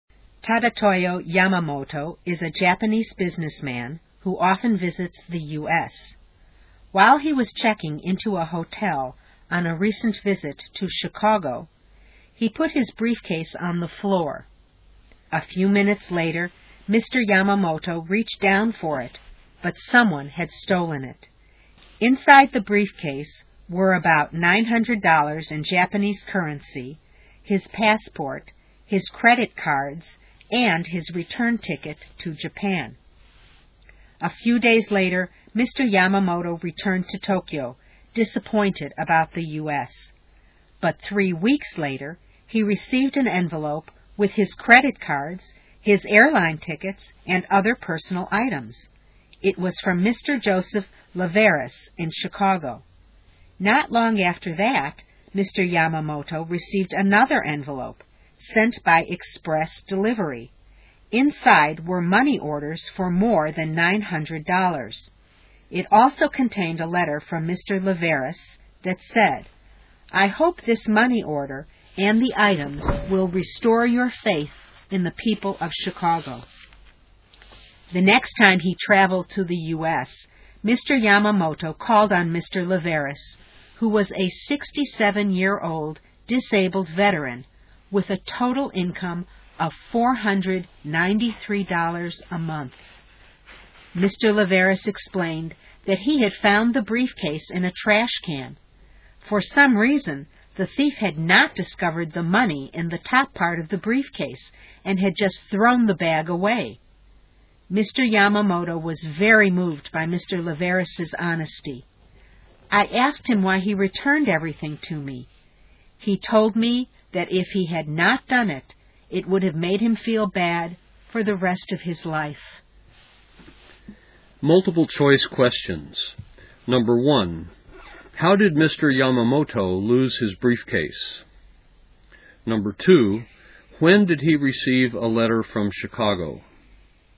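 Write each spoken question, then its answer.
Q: how did Mr. Yamamoto lose his briefcase?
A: Someone stole it while he was checking into a hotel in Chicago

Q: when did he receive a letter from Chicago?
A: About 3 weeks after returning to Tokyo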